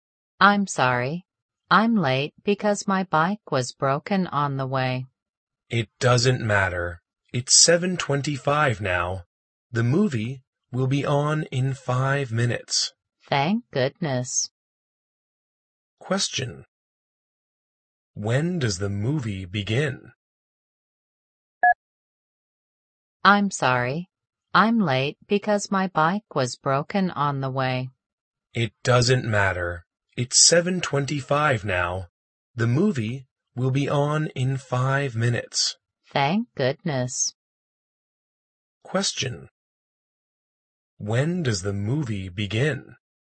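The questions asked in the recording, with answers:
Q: When does the movie begin?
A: At 7:30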